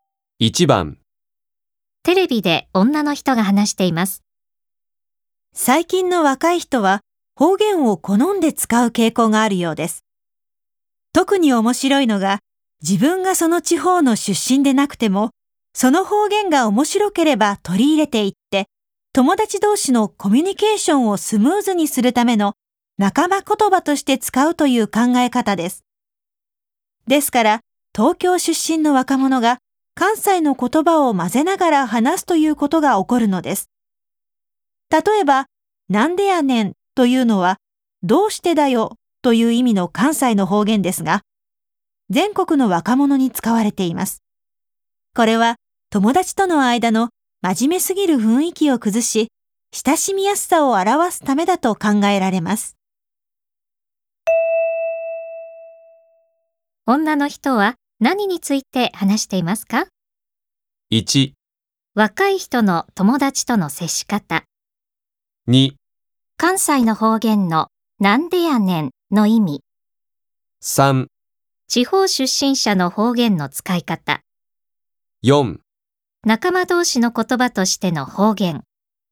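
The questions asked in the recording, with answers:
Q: 女の人は何について話していますか?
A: 4: 仲間同士の言葉としての方言。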